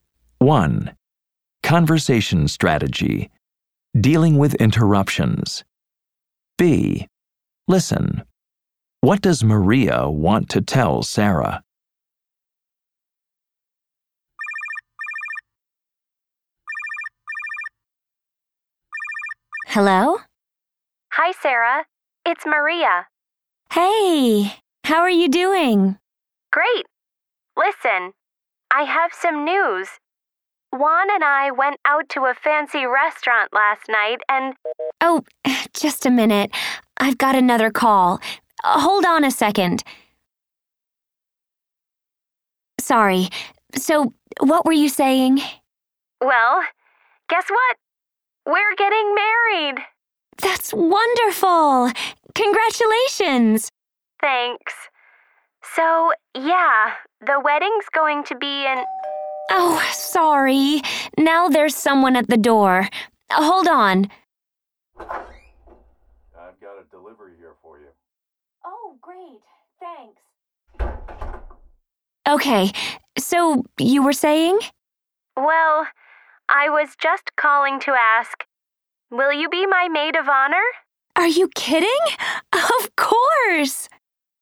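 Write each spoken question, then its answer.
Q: What does Maria want to tell Sarah?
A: She and Juan are getting married, and she wants Sarah to be her maid of honor.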